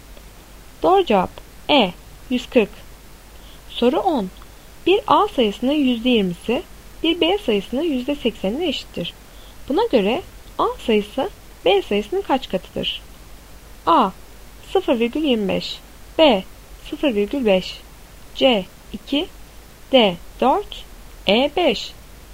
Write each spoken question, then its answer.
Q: Buna göre A sayısı B sayısının kaç katıdır?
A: Doğru cevap D 4.